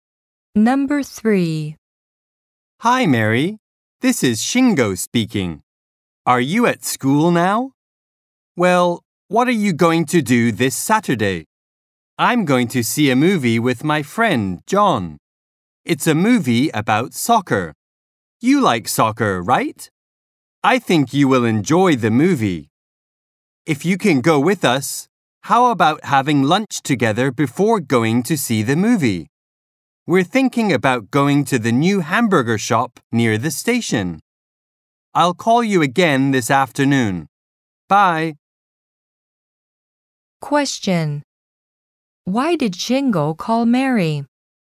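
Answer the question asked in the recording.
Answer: To invite her to see a movie on Saturday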